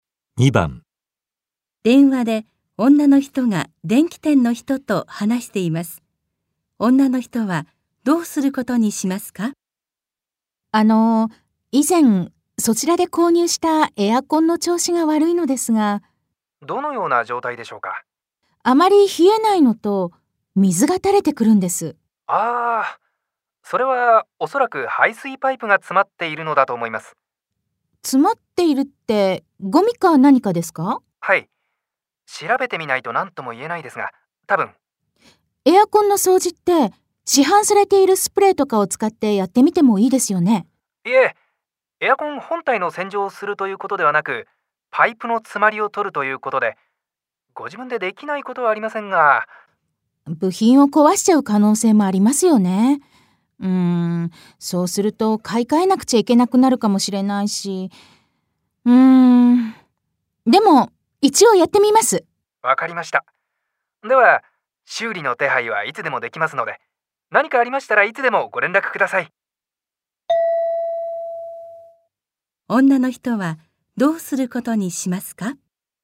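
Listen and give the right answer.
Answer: 自分で排水パイプの詰まりを取ってみる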